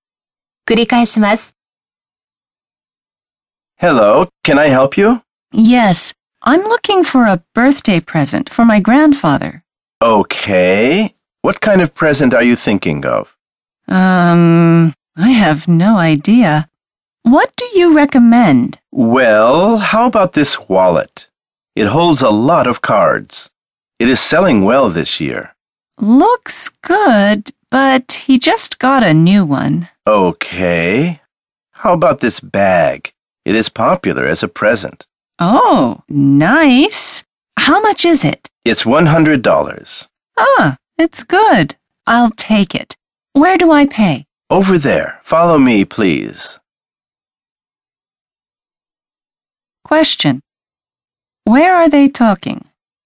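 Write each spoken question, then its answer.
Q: Where are they talking?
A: At a store (shop)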